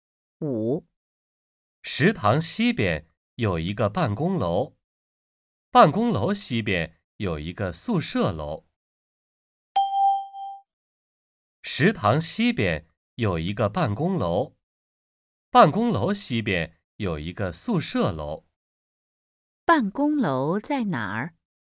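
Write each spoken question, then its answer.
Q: 办公楼在哪儿?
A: 在食堂西边,宿舍楼东边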